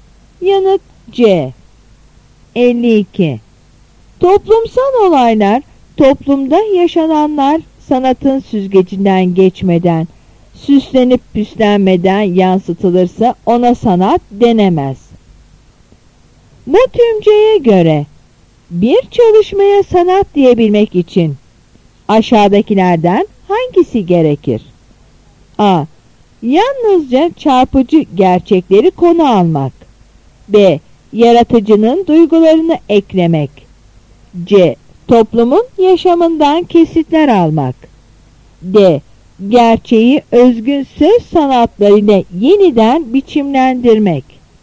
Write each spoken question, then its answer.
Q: Bu tümceye göre bir çalışmaya sanat diyebilmek için aşağıdakilerden hangisi gerekir?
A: Yanıt D.